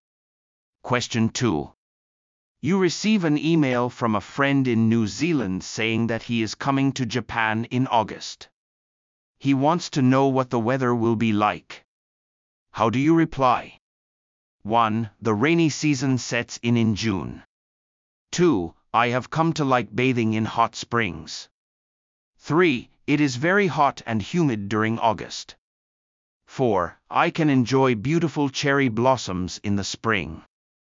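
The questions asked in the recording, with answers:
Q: How do you reply?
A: 3: It is very hot and humid during August.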